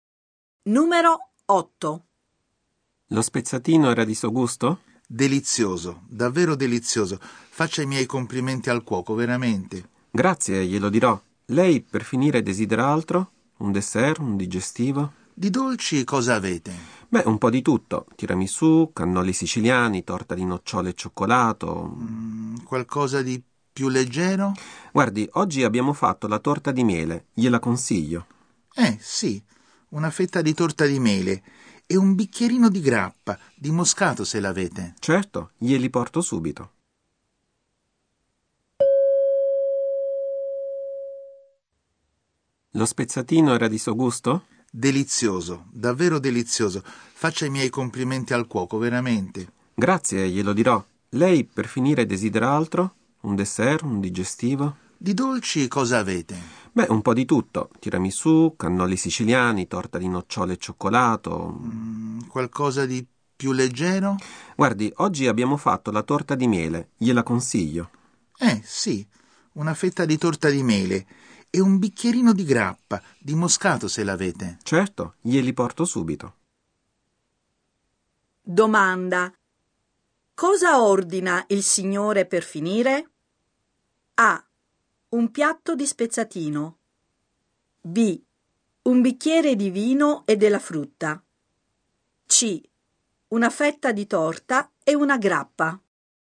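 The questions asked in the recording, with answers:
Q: Domanda. Cosa ordina il signore per finire?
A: C: Una fetta di torta e una grappa.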